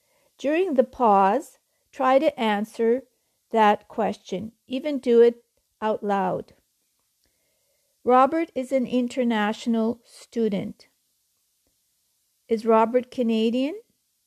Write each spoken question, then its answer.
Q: Is Robert Canadian?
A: No, he's not Canadian. He's from another country.